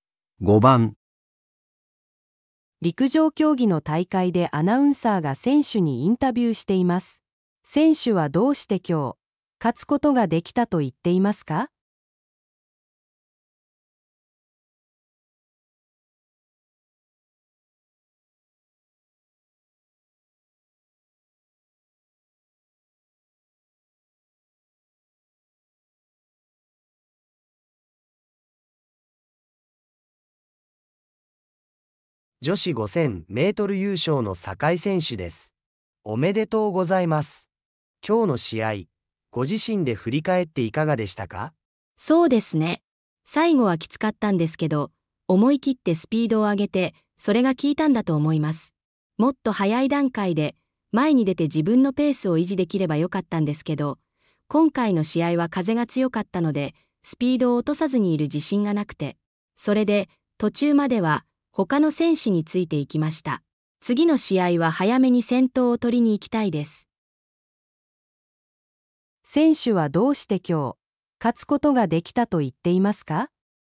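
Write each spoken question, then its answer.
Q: 選手はどうして今日、勝つことができたと言っていますか?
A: 最後に思い切ってスピードを上げたから

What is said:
陸上競技の大会でアナウンサーが選手にインタビューしています。選手はどうして今日、勝つことができたと言っていますか。
男:女子5000メートル優勝の酒井選手です。おめでとうございます。今日の試合、ご自身で振り返っていかがでしたか?
女:そうですね。最後はきつかったんですけど、思い切ってスピードを上げて、それが効いたんだと思います。もっと早い段階で前に出て自分のペースを維持できればよかったんですけど、今回の試合は風が強かったのでスピードを落とさずにいる自信がなくて・・・。それで途中まではほかの選手についていきました。次の試合は早めに先頭を取りに行きたいです。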